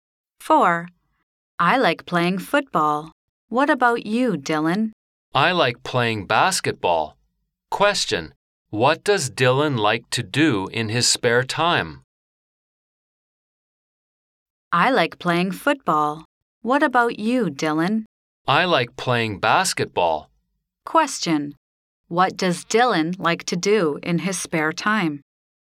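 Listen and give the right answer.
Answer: Play basketball.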